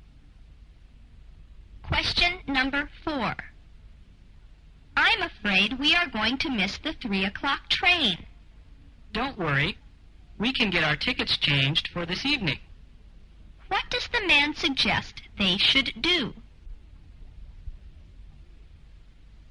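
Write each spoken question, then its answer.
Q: What does the man suggest they should do?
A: Change their tickets for an evening train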